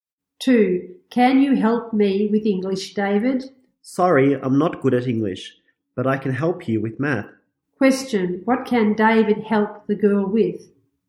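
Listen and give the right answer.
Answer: Math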